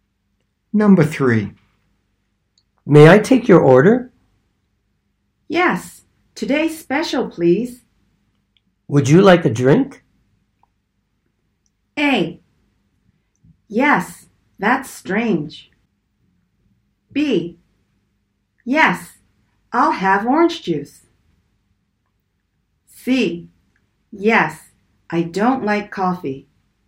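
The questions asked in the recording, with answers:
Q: Would you like a drink?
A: B: Yes, I'll have orange juice.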